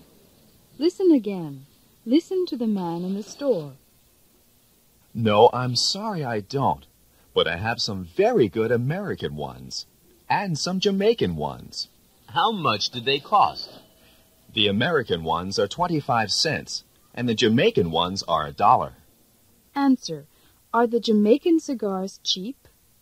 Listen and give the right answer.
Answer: No, they're not.